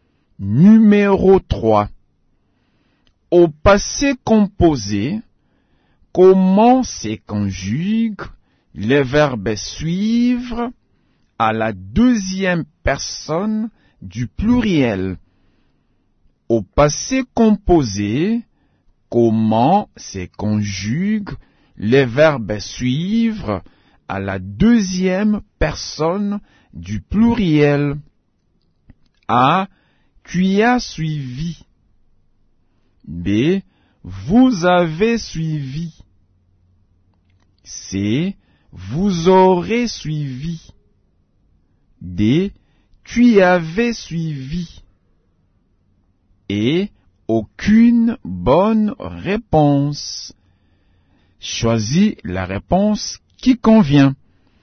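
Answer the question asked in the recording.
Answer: B: Vous avez suivi.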